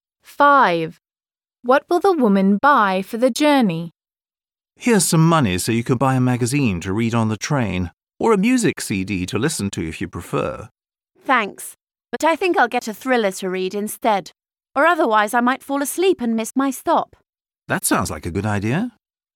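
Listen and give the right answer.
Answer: A thriller (book)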